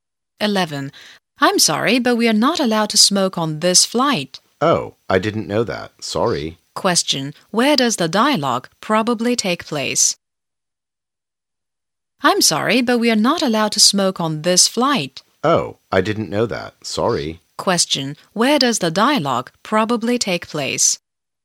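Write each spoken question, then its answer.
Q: Where does the dialogue probably take place?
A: On a plane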